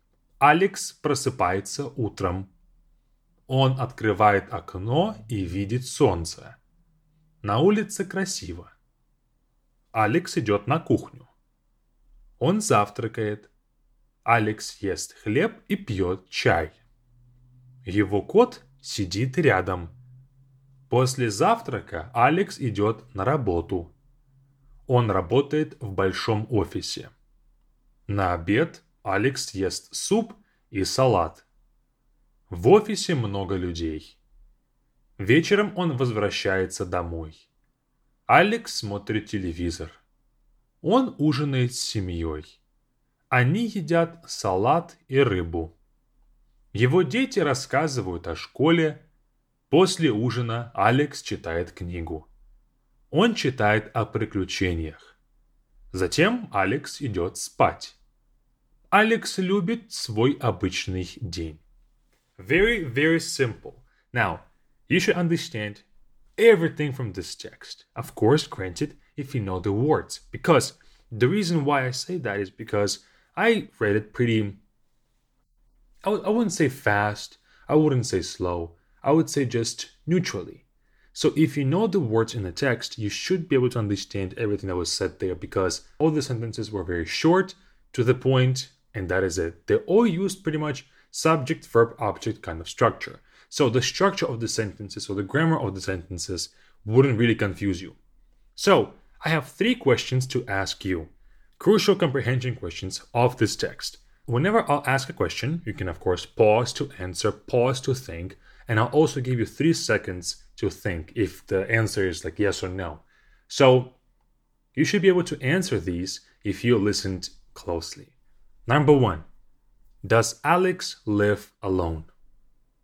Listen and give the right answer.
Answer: And the answer is no. He has a cat, family with kids.